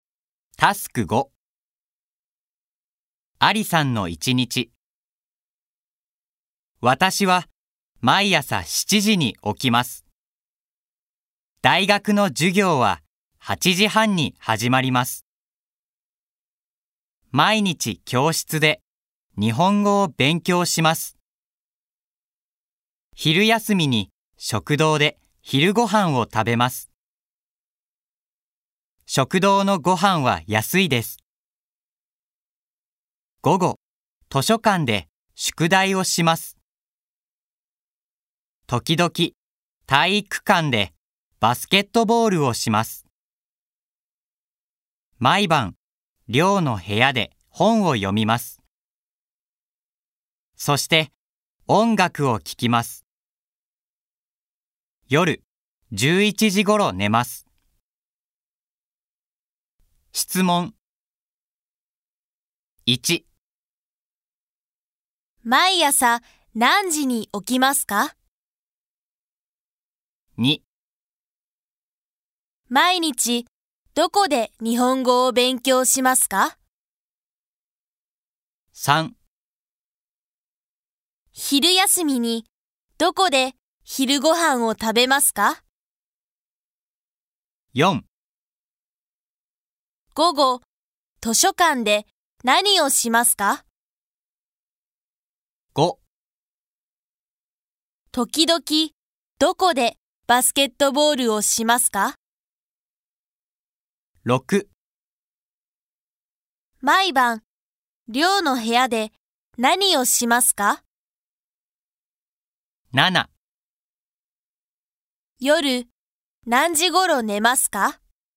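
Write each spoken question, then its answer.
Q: 毎朝何時に起きますか?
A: 7時

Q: 毎日どこで日本語を勉強しますか?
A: 教室

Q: 昼休みにどこで昼ご飯を食べますか?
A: 食堂

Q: 午後、図書館で何をしますか?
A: 宿題をします

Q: 時々、どこでバスケットボールをしますか?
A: 体育館

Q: 毎晩、寮の部屋で何をしますか?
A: 本を読みます。そして、音楽を聴きます

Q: 夜、何時ごろ寝ますか?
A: 11時ごろ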